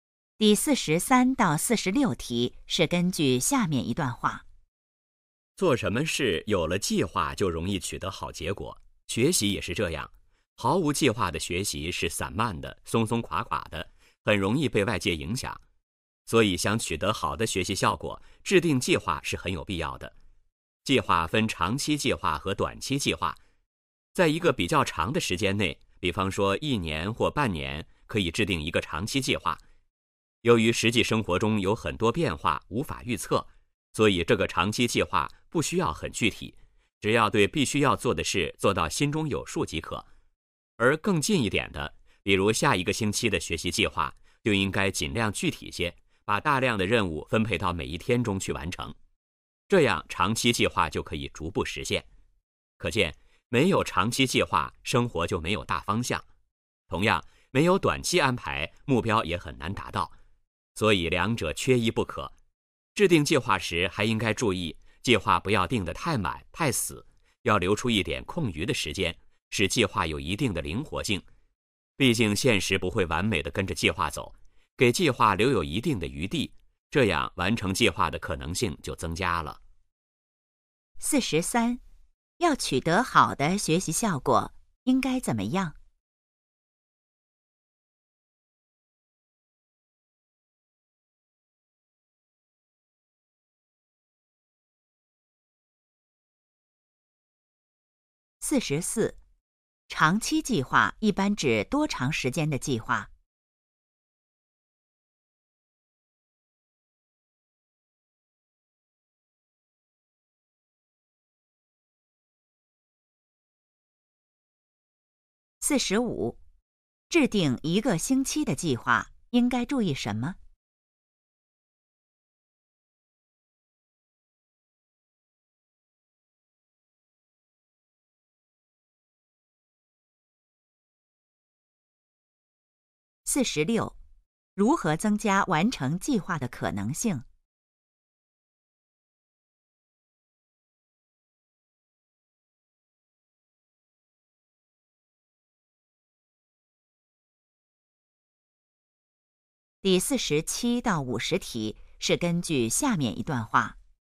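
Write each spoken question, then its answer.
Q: 要取得好的学习效果,应该怎么样?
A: 制定计划

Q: 长期计划一般指多长时间的计划?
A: 一年或半年

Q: 制定一个星期的计划,应该注意什么?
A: 尽量具体

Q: 如何增加完成计划的可能性?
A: 留出一点空余时间,使计划灵活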